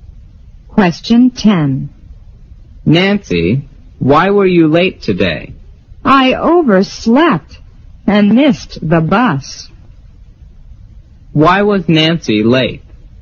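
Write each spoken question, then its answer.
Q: Why was Nancy late?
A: She overslept and missed the bus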